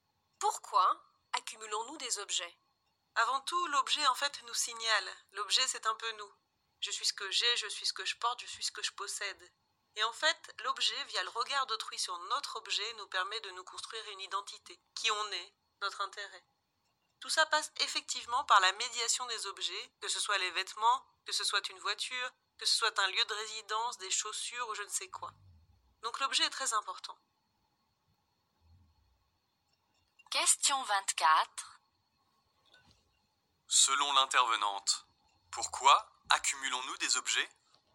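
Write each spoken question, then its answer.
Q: Selon l'intervenante, pourquoi accumulons-nous des objets?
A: Parce que les objets nous signalent et, via le regard d'autrui, nous permettent de nous construire une identité.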